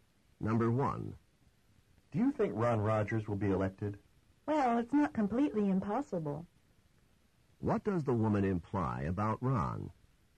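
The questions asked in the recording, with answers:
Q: What does the woman imply about Ron?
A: It's possible Ron will be elected.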